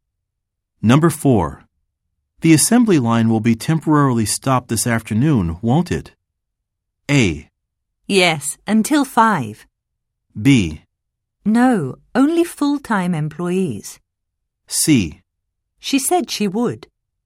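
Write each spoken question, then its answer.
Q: The assembly line will be temporarily stopped this afternoon, won't it?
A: A: Yes, until 5.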